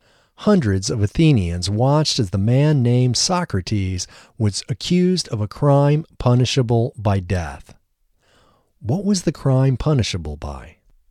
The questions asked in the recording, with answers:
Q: What was the crime punishable by?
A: The crime was punishable by death.